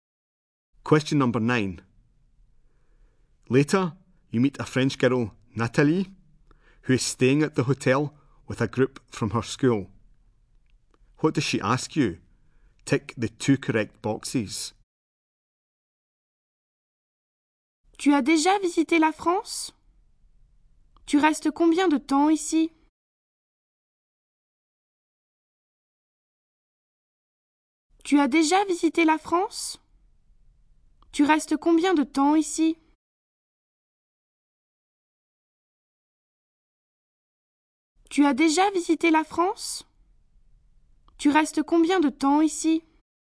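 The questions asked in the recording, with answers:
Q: What does she ask you? Tick the two correct boxes.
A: Whether you have visited France before and how long you are staying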